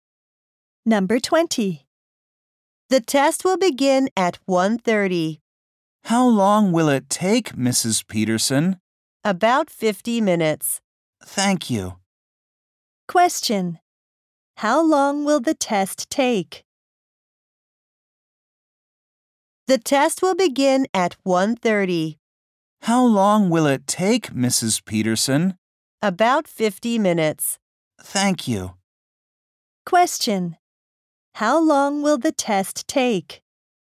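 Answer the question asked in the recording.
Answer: About 50 minutes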